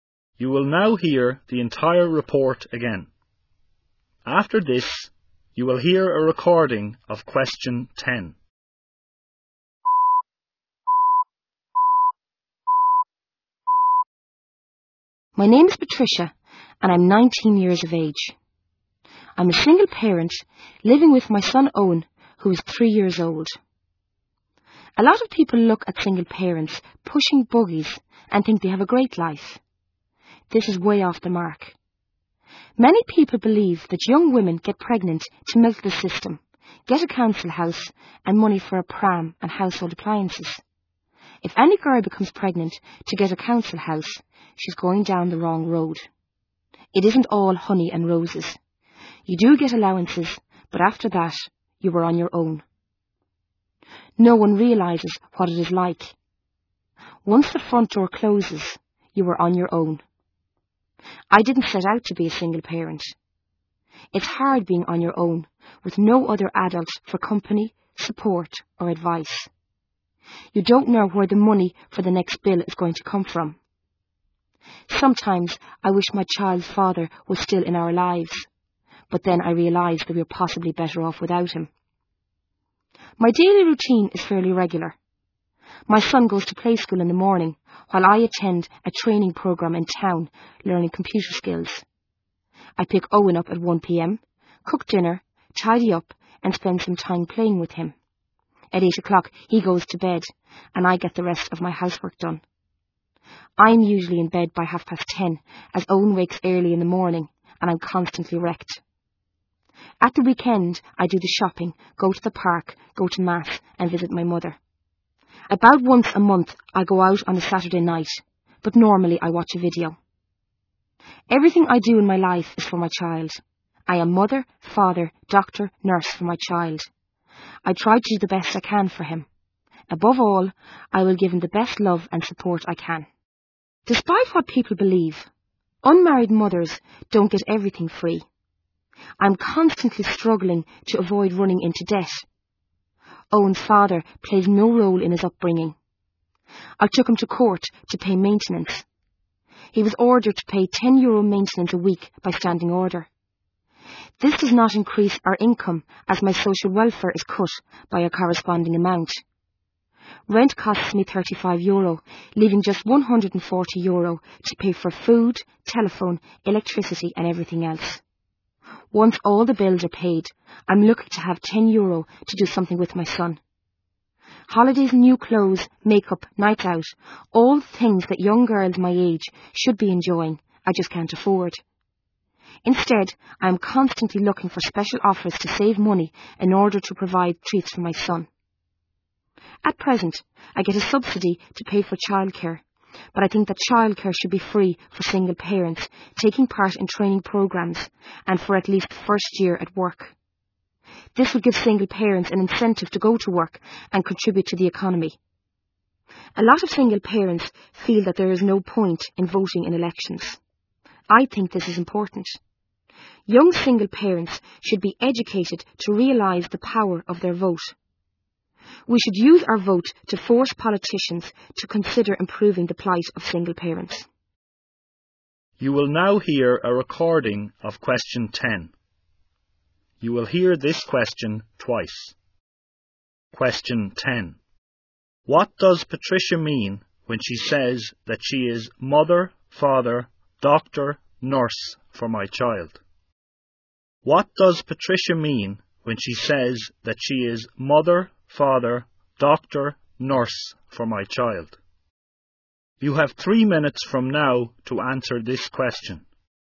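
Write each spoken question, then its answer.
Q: What does Patricia mean when she says that she is mother, father, doctor, nurse for my child?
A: She raises and cares for her son entirely on her own, taking on every role because his father is not involved and no other adult helps her.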